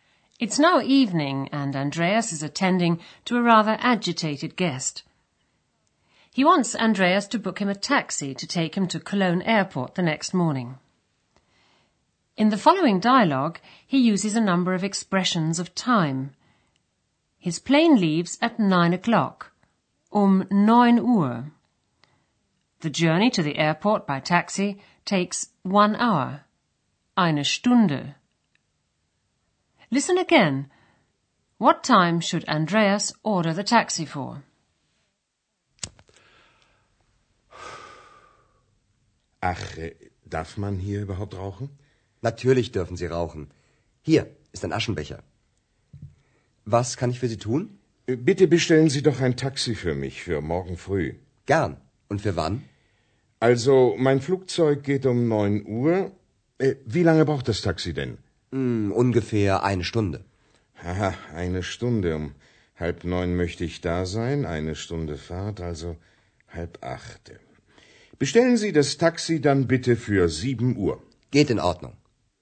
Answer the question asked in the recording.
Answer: Andreas has to order the taxi for 7 o'clock the next morning.